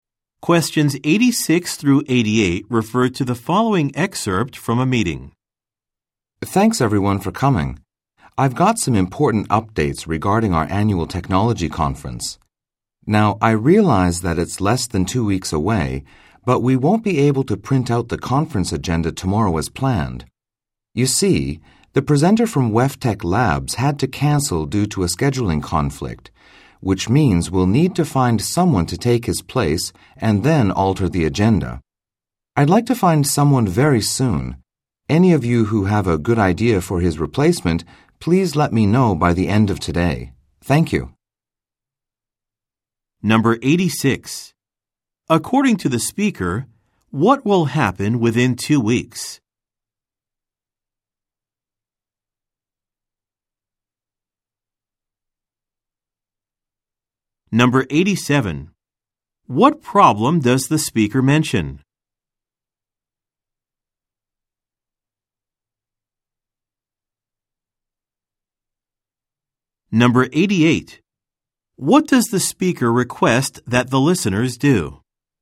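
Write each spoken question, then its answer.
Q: According to the speaker, what will happen within two weeks?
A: The annual technology conference will take place.

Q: What problem does the speaker mention?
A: A presenter canceled, so the agenda must be changed.

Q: What does the speaker request that the listeners do?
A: Suggest a replacement presenter by the end of the day.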